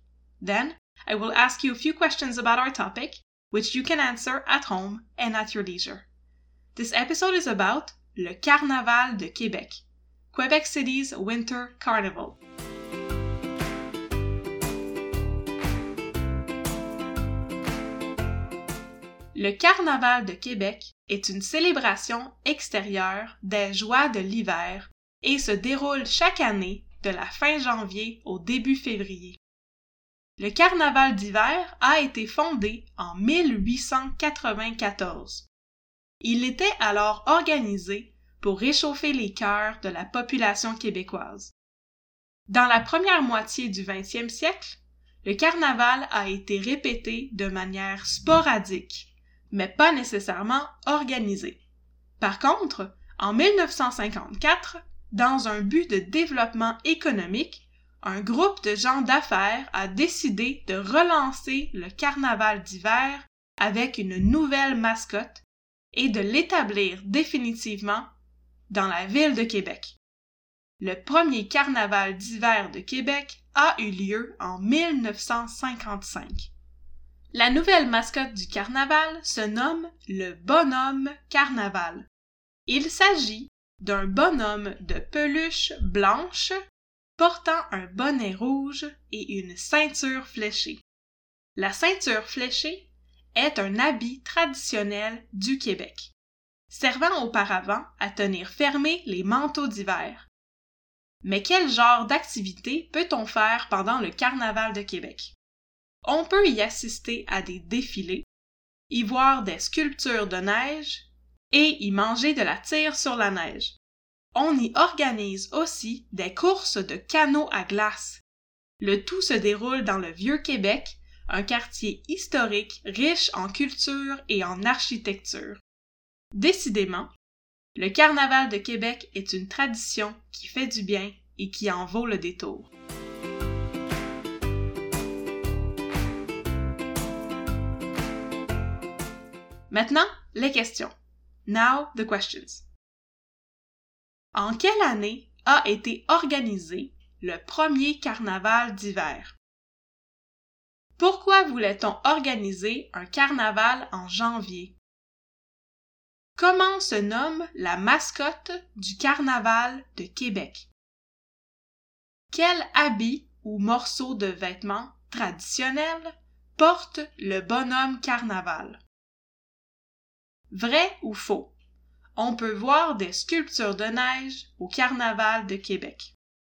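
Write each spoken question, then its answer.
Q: Pourquoi voulait-on organiser un carnaval en janvier?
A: Pour réchauffer les cœurs de la population québécoise

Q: Comment se nomme la mascotte du Carnaval de Québec?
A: Le Bonhomme Carnaval

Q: Quel habit ou morceau de vêtement traditionnel porte le bonhomme Carnaval?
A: La ceinture fléchée

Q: Vrai ou faux? On peut voir des sculptures de neige au Carnaval de Québec.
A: Vrai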